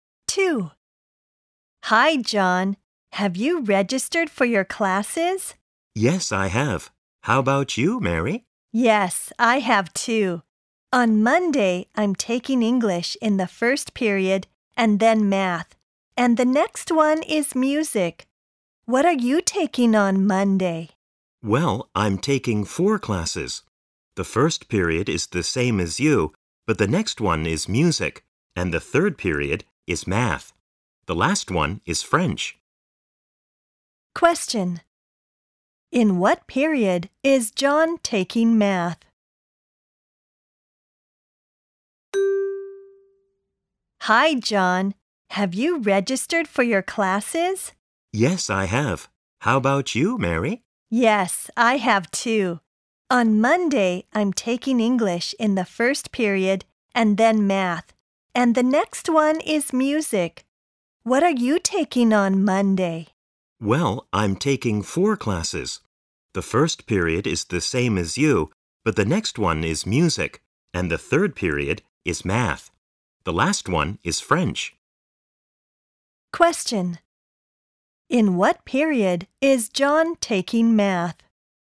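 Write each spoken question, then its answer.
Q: In what period is John taking math?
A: The third period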